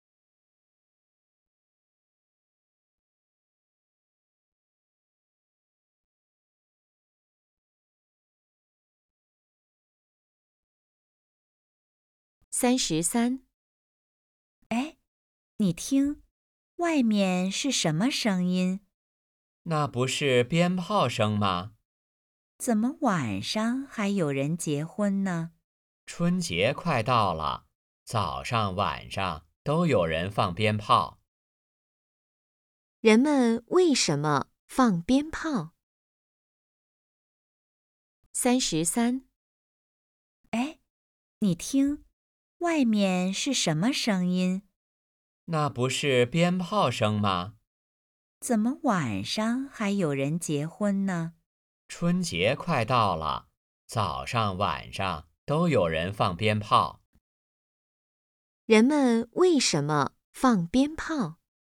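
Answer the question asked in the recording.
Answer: 春节快到了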